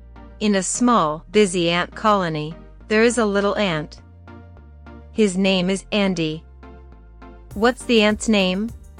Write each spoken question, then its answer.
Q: What's the ant's name?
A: Andy. His name is Andy.